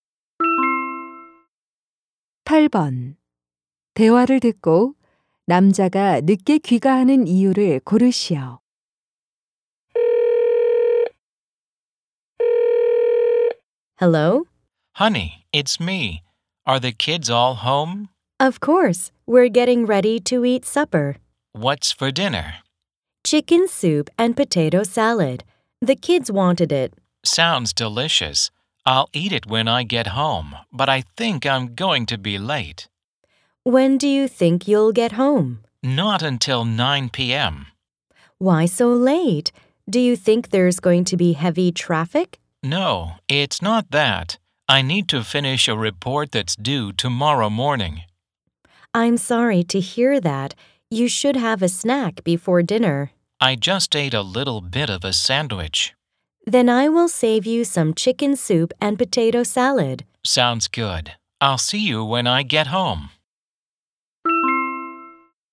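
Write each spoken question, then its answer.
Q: 대화를 듣고 남자가 늦게 귀가하는 이유를 고르시오.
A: 내일 아침까지 보고서를 끝내야 해서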